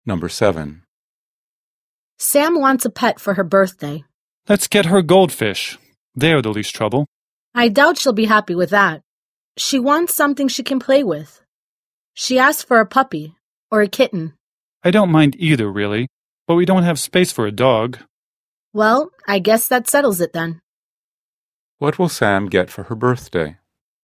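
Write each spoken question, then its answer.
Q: What will Sam get for her birthday?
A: A kitten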